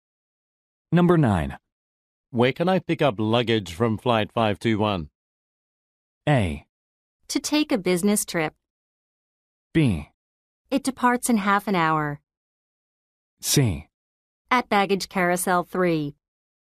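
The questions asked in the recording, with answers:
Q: Where can I pick up luggage from Flight 521?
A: C: At Baggage Carousel 3.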